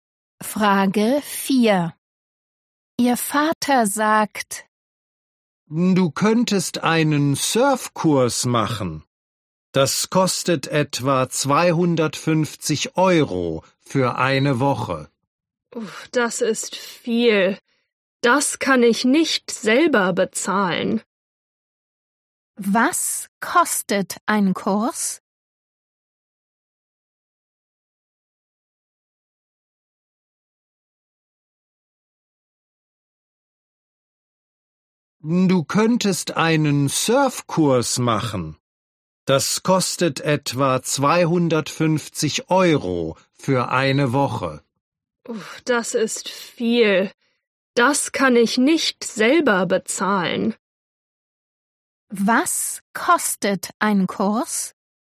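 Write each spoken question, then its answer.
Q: Was kostet ein Kurs?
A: etwa 250 Euro für eine Woche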